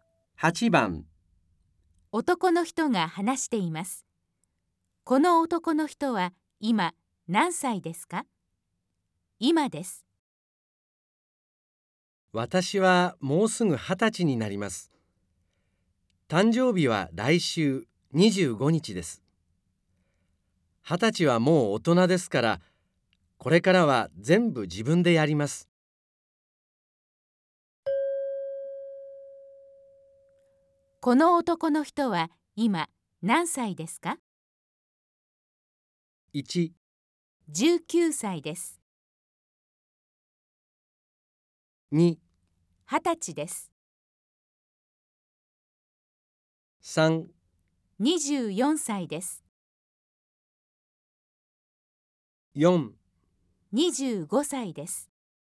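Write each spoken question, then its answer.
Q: この男の人は今何歳ですか?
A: 1: 19歳です。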